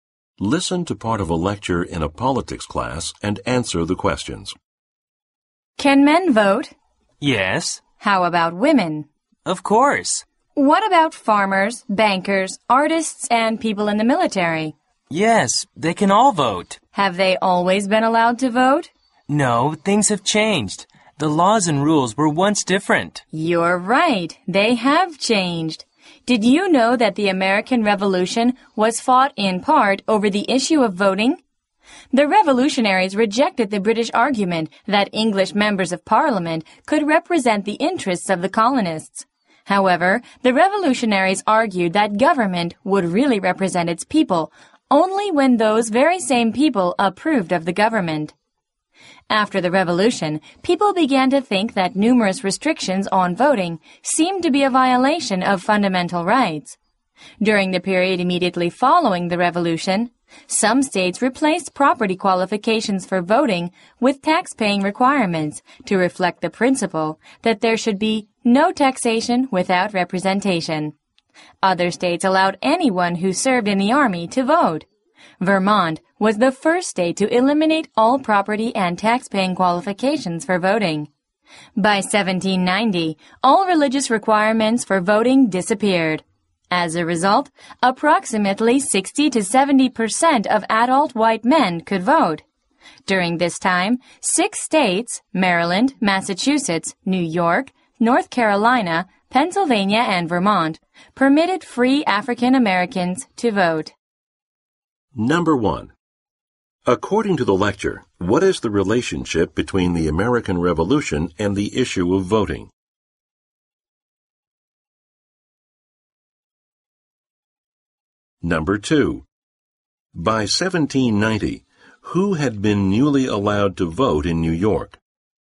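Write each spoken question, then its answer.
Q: According to the lecture, what is the relationship between the American Revolution and the issue of voting?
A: The Revolution was fought partly over voting rights (representation)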